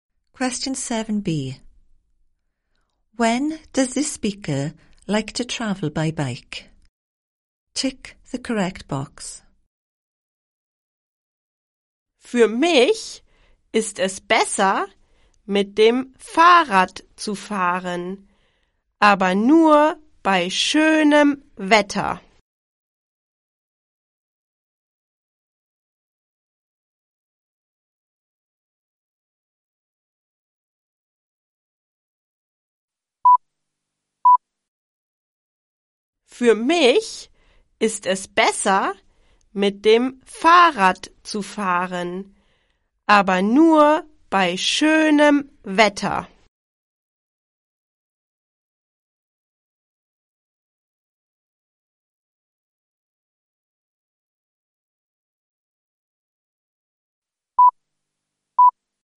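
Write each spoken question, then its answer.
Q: When does this speaker like to travel by bike?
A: Only in nice weather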